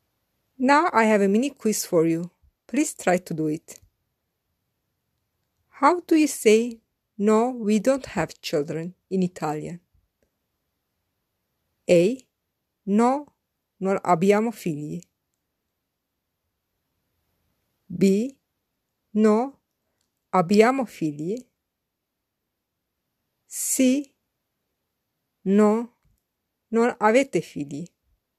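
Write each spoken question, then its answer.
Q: How do you say, no, we don't have children in Italian?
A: A: No, non abbiamo figli.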